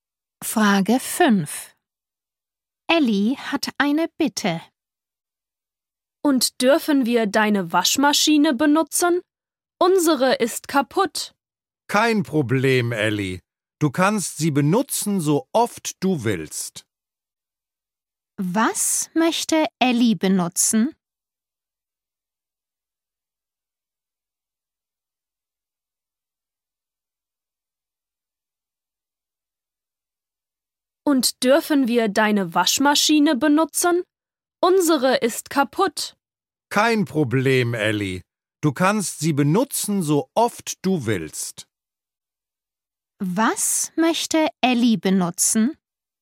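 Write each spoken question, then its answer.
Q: Was möchte Ellie benutzen?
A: die Waschmaschine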